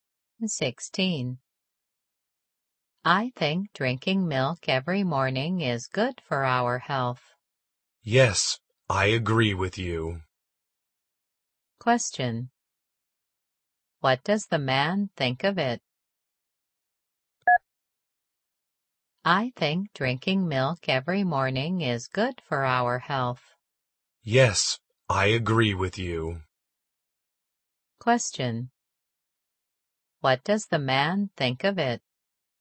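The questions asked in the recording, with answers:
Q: What does the man think of it?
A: He agrees it's good for our health.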